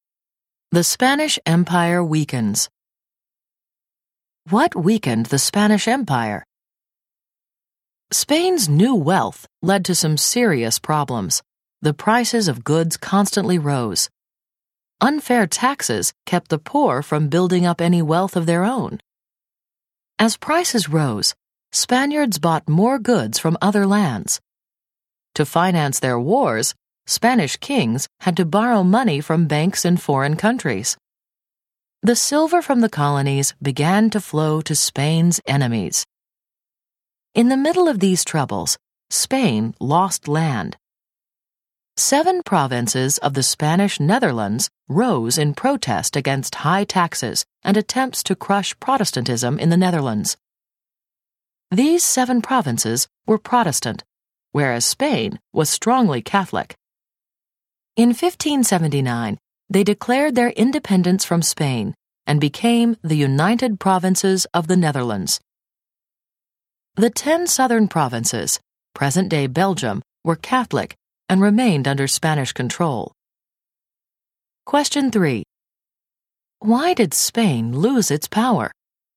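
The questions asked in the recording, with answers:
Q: Why did Spain lose its power?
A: Rising prices, unfair taxes, foreign debts and loss of the Dutch provinces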